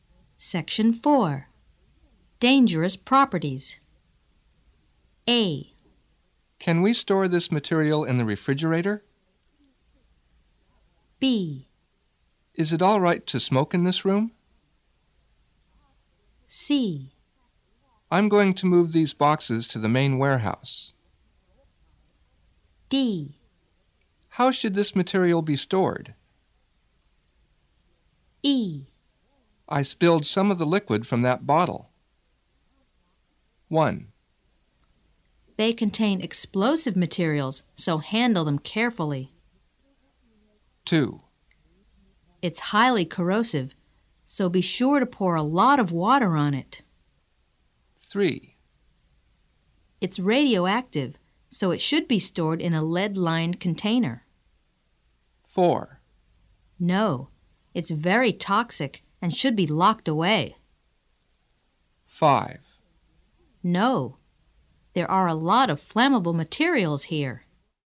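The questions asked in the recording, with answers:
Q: They contain explosive materials, so handle them carefully.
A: C: I'm going to move these boxes to the main warehouse.

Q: It's highly corrosive, so be sure to pour a lot of water on it.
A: E: I spilled some of the liquid from that bottle.

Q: It's radioactive, so it should be stored in a lead-lined container.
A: D: How should this material be stored?

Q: No, it's very toxic and should be locked away.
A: A: Can we store this material in the refrigerator?

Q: No, there are a lot of flammable materials here.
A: B: Is it all right to smoke in this room?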